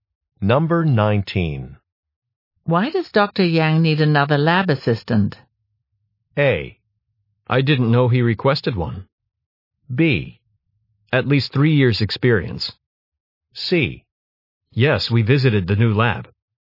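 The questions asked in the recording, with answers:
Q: Why does Dr. Yang need another lab assistant?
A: A: I didn't know he requested one.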